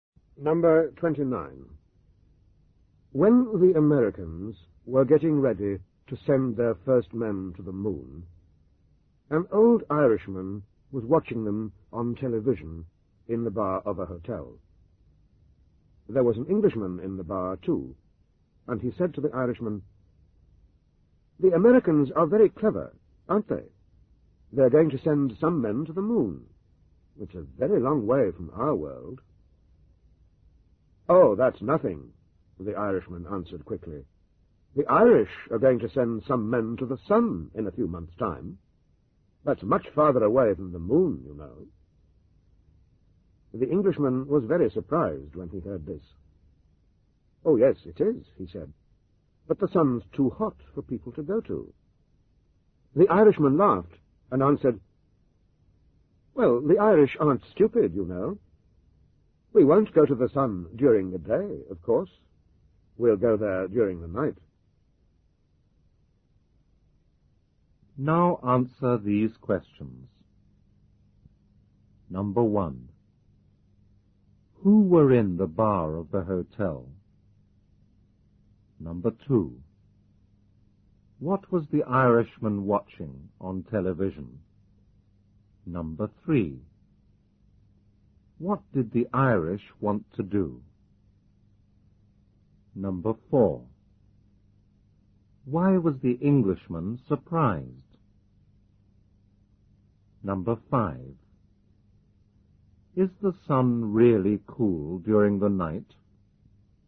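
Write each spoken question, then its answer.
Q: Who were in the bar of the hotel?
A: An old Irishman and an Englishman

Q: What was the Irishman watching on television?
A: The Americans getting ready to send their first men to the moon

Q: What did the Irish want to do?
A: Send some men to the sun

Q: Why was the Englishman surprised?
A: Because the Irishman said the Irish were going to send men to the sun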